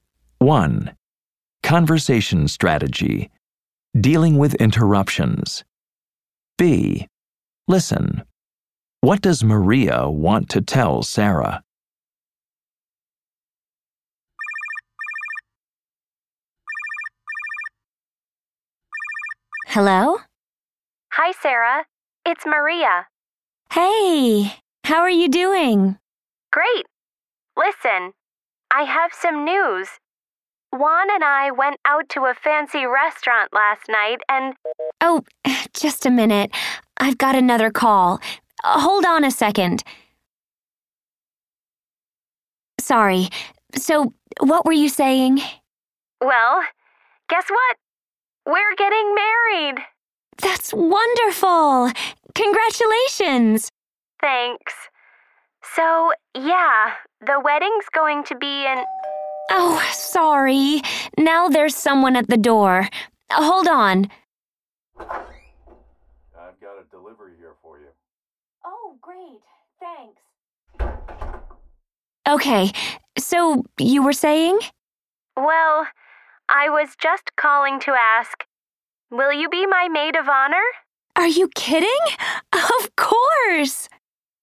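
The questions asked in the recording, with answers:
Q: What does Maria want to tell Sarah?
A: She and Juan are getting married, and she wants Sarah to be her maid of honor.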